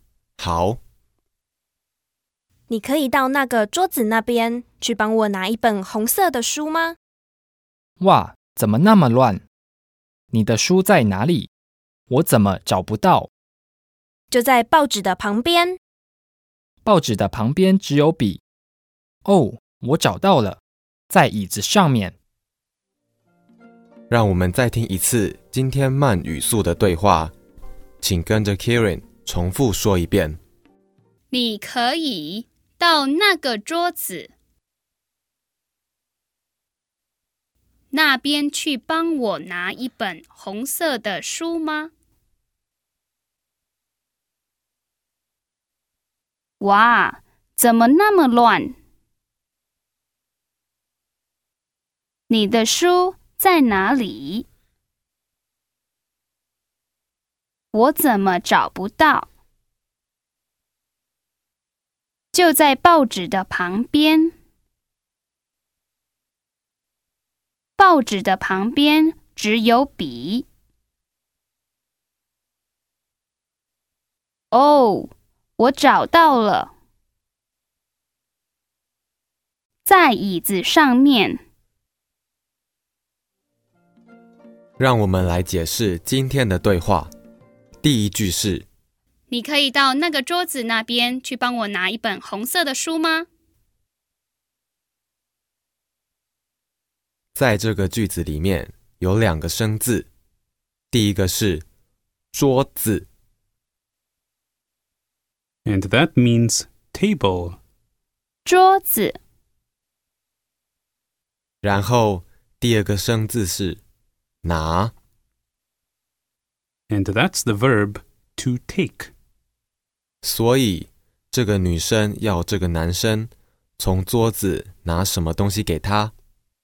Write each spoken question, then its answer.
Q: 所以这个女生要这个男生从桌子拿什么东西给她?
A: 一本红色的书。